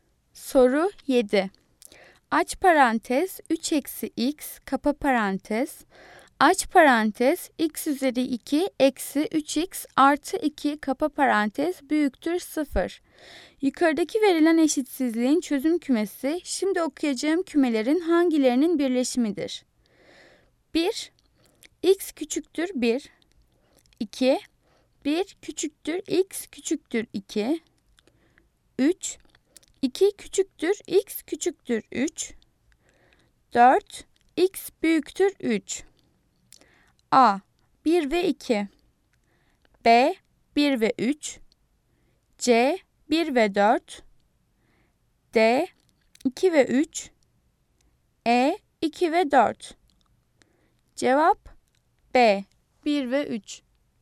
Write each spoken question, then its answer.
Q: Yukarıdaki verilen eşitsizliğin çözüm kümesi şimdi okuyacağım kümelerin hangilerinin birleşimidir?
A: Cevap B. 1 ve 3.